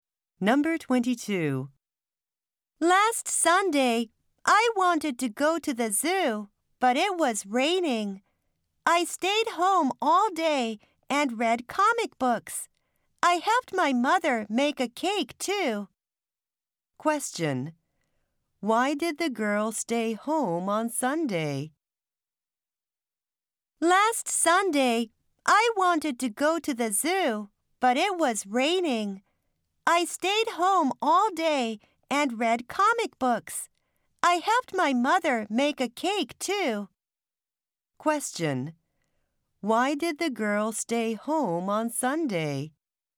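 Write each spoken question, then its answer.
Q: Why did the girl stay home on Sunday?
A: Because it was raining.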